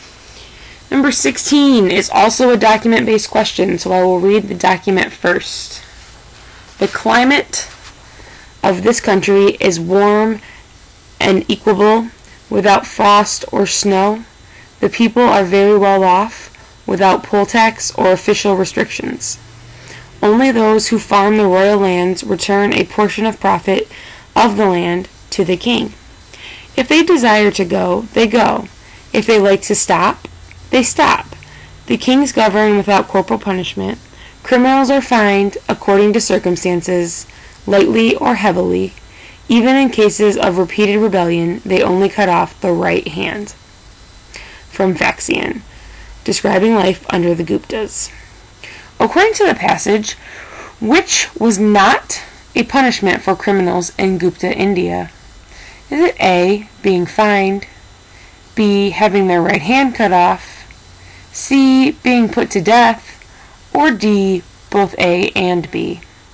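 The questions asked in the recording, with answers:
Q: According to the passage, which was not a punishment for criminals in Gupta India?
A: C: Being put to death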